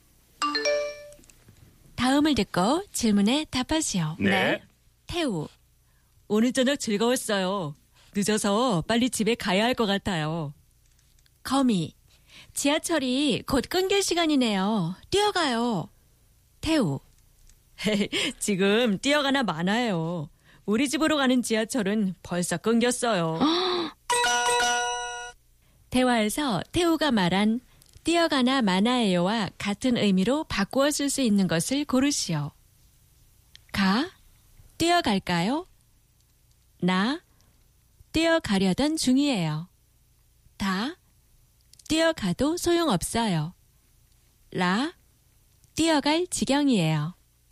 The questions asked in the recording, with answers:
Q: 대화에서 태우가 말한 뛰어가나 마나예요와 같은 의미로 바꾸어 쓸 수 있는 것을 고르시오.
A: 다 뛰어가도 소용없어요. No point in running.